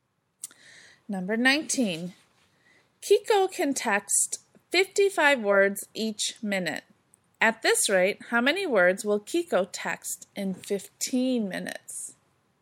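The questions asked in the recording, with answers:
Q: At this rate, how many words will Kiko text in 15 minutes?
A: 825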